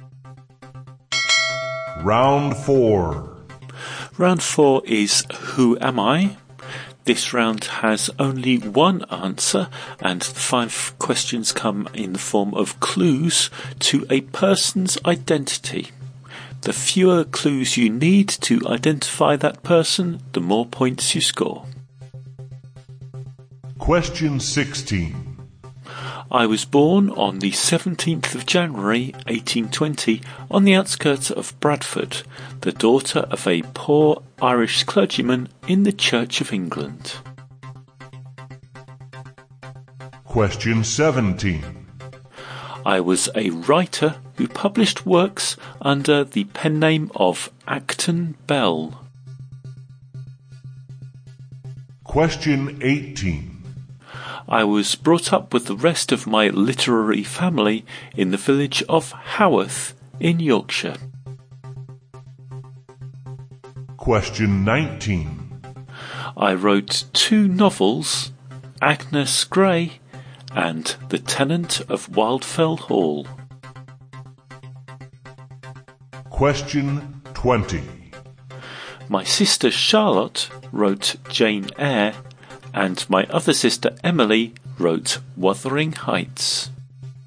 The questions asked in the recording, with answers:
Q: Round 4 is Who Am I? This round has only one answer, and the five questions come in the form of clues to a person's identity.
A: And the mystery person was Anne Bronte.